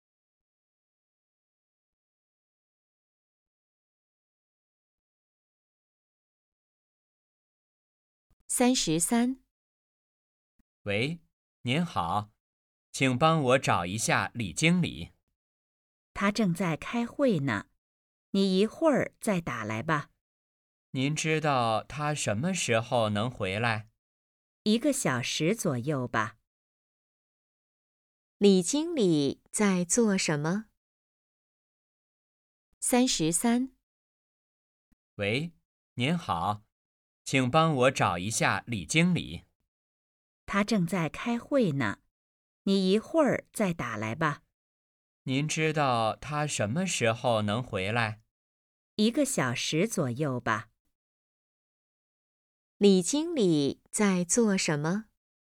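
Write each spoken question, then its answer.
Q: 李经理在做什么?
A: 开会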